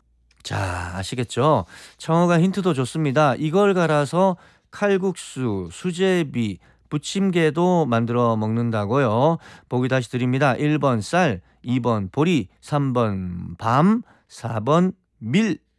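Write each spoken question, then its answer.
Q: 이걸 갈아서 칼국수, 수제비, 부침개도 만들어 먹는다고요. 보기 다시 드립니다. 1번 쌀, 2번 보리, 3번 밤, 4번 밀.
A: 4: 밀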